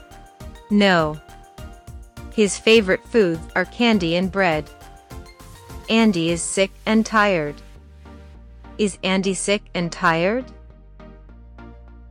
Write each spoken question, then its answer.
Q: Is Andy sick and tired?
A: Yes, he is. He's very sick and tired.